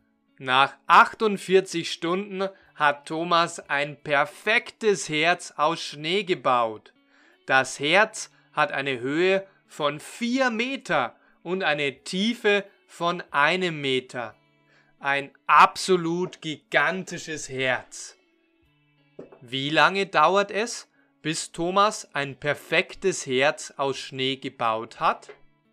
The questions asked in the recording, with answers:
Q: Wie lange dauert es, bis Thomas ein perfektes Herz aus Schnee gebaut hat?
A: 48 Stunden. Es dauert 48 Stunden.